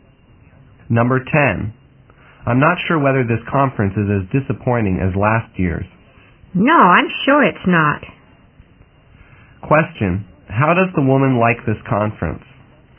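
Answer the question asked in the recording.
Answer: She thinks it is better than last year's, not as disappointing.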